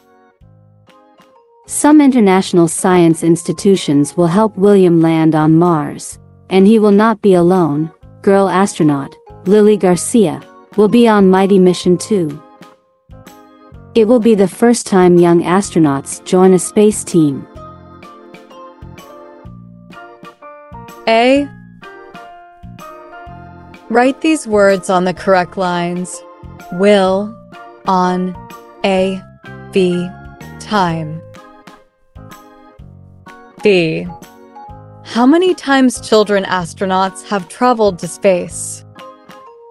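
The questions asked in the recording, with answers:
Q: How many times children astronauts have traveled to space?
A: Never; this will be the first time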